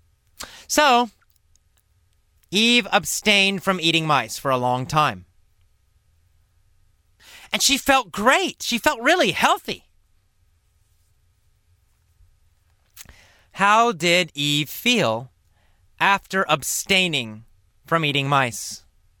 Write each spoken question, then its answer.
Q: How did Eve feel after abstaining from eating mice?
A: Well, she felt great. She felt very healthy.